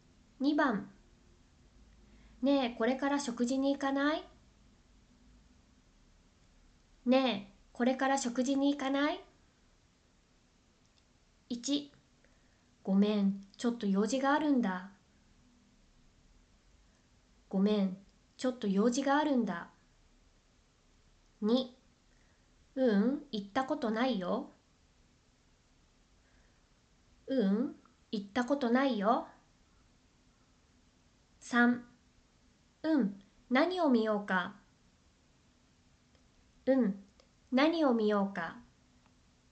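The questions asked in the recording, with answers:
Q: ねえ、これから食事に行かない?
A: 1: ごめん、ちょっと用事があるんだ。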